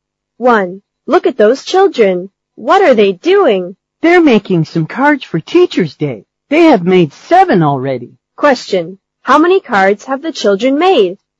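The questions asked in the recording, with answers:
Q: Question. How many cards have the children made?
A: Seven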